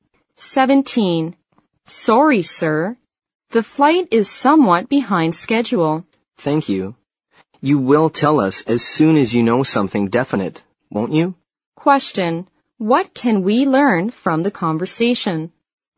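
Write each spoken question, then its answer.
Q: What can we learn from the conversation?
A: The flight is delayed.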